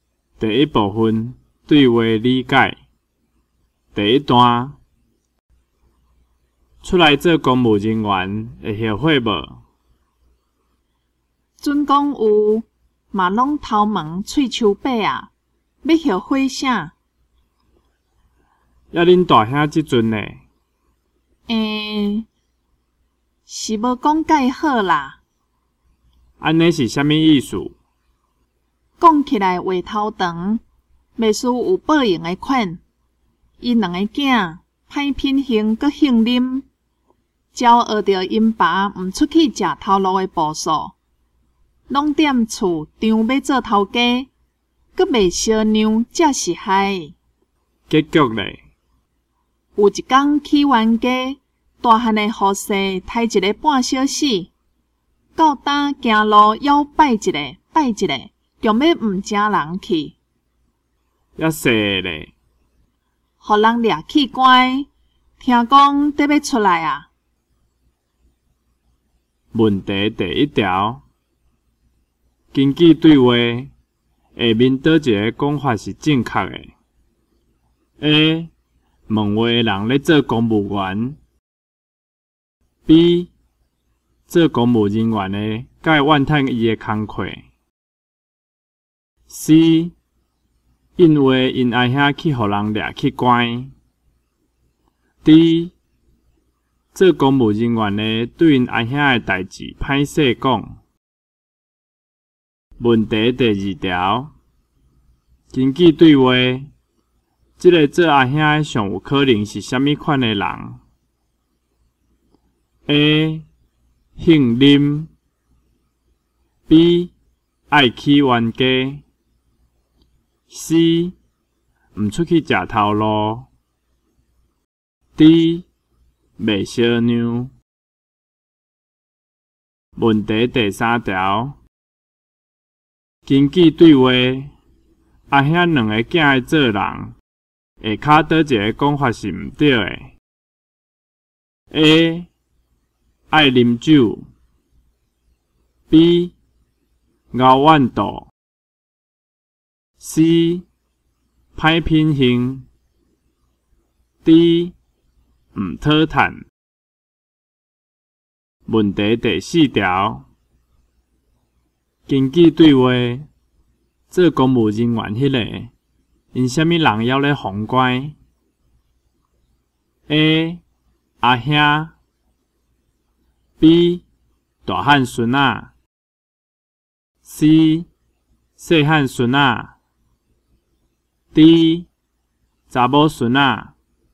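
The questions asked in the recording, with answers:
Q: 根据对话,下面倒一个讲法是正确的。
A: D: 做公务人员的对因阿兄的代志歹势讲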